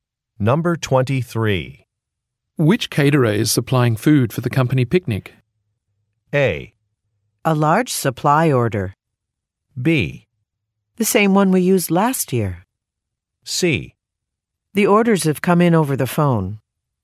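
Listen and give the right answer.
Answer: B: The same one we used last year.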